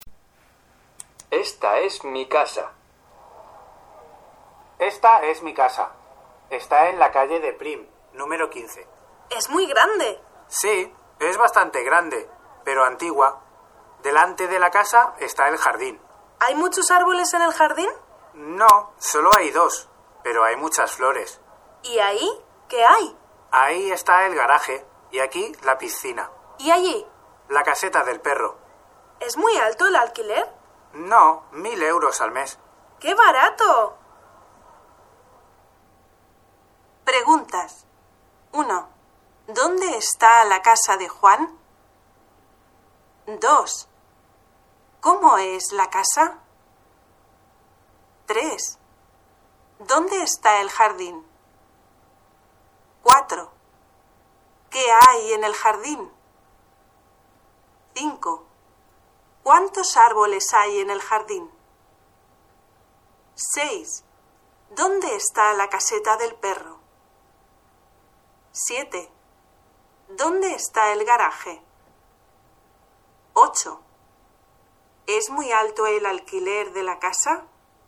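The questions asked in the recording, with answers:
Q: ¿Dónde está la casa de Juan?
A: En la calle de Prim, número 15

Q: ¿Cómo es la casa?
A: Bastante grande, pero antigua

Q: ¿Dónde está el jardín?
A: Delante de la casa

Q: ¿Qué hay en el jardín?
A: Dos árboles y muchas flores

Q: ¿Cuántos árboles hay en el jardín?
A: Dos

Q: ¿Es muy alto el alquiler de la casa?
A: No, 1.000 euros al mes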